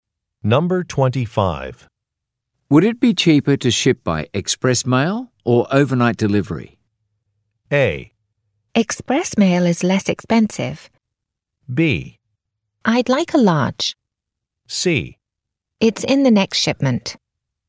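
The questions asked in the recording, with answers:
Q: Would it be cheaper to ship by express mail or overnight delivery?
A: A: Express mail is less expensive.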